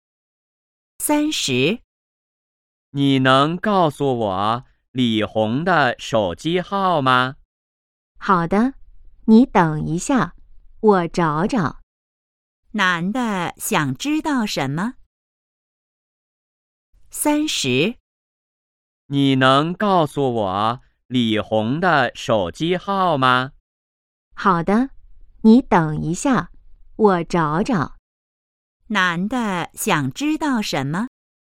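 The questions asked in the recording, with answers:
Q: 男的想知道什么?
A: 李红的手机号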